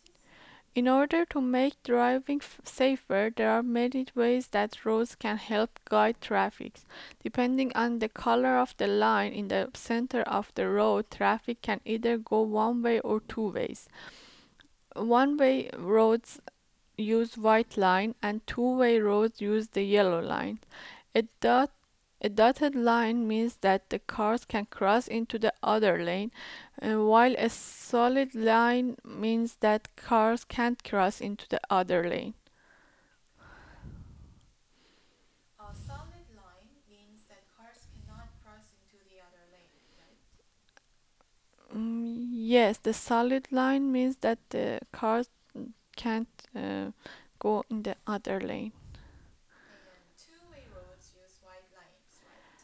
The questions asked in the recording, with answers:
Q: Two-way roads use white lines, right?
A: No, the two-way roads use the yellow lines.